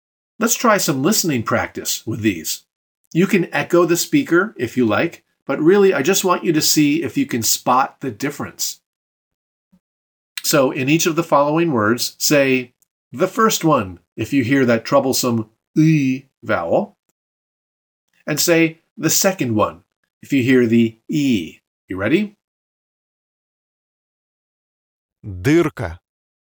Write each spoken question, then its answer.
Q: Дырка.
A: First one.